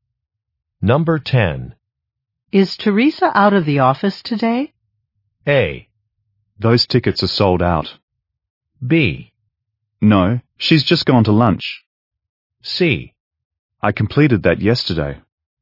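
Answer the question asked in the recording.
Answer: B: No, she's just gone to lunch.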